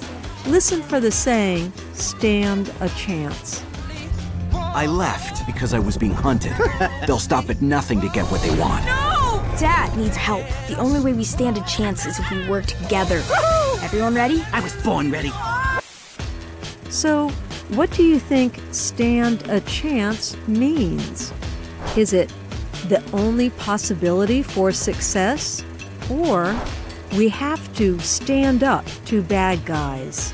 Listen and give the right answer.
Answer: Stand a chance means the only possibility for success.